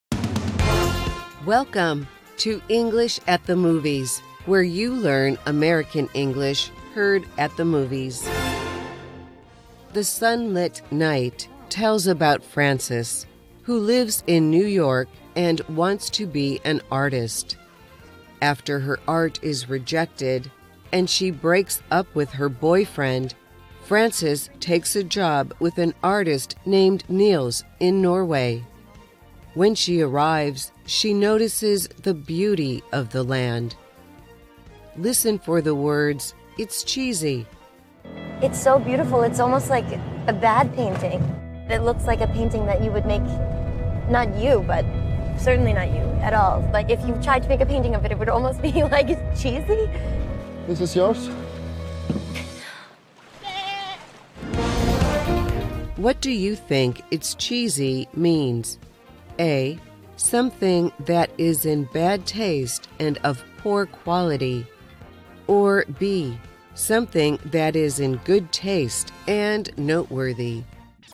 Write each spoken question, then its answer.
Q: What do you think it's cheesy means?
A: The answer is A. It's cheesy describes something that is in bad taste and of poor quality.